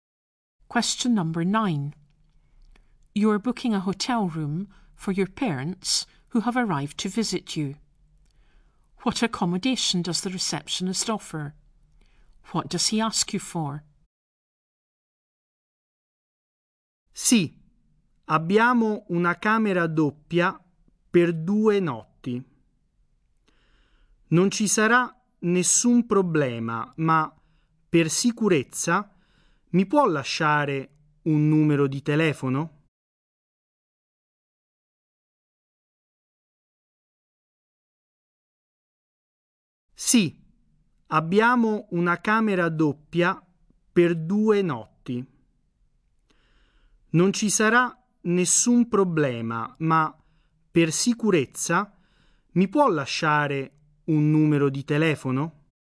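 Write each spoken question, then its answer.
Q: What accommodation does the receptionist offer?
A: A double room for two nights

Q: What does he ask you for?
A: A phone number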